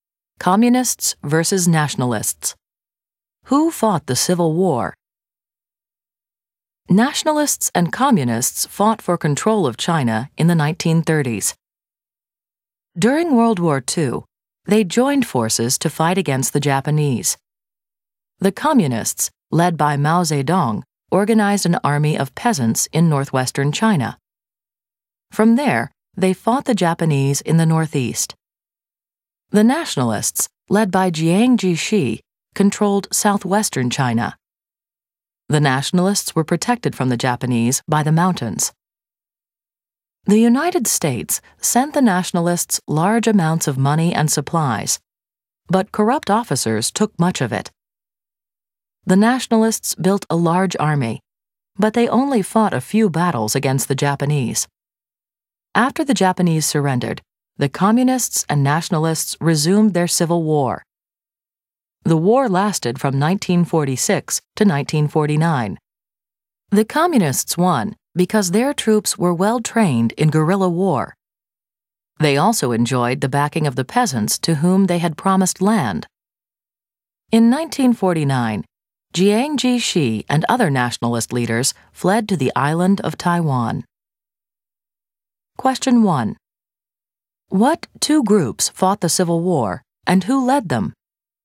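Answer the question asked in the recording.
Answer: Nationalists led by Jiang Jieshi and communists led by Mao Zedong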